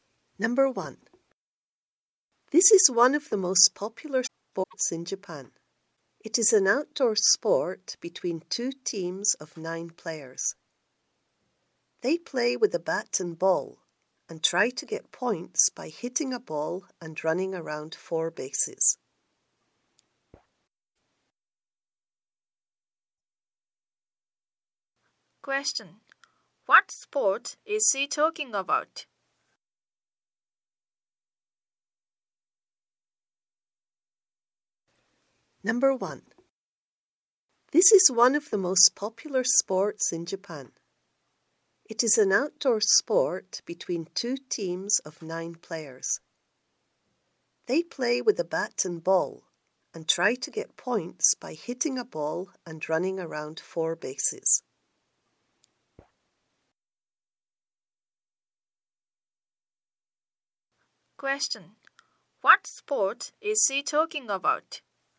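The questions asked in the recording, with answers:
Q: What sport is he talking about?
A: Baseball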